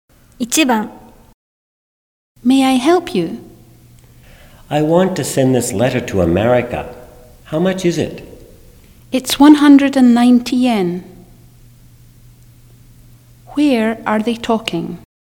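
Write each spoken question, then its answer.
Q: Where are they talking?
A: At a post office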